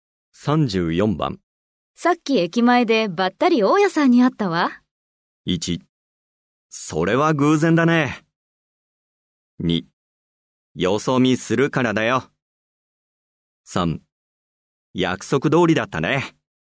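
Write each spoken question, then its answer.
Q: さっき駅前でばったり大家さんに会ったわ。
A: 1: それは偶然だね。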